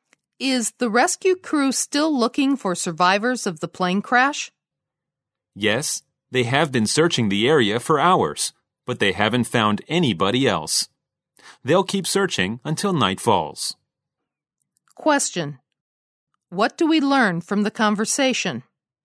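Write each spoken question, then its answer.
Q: What do we learn from the conversation?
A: The rescue crew has searched for hours without finding more survivors and will keep searching until night falls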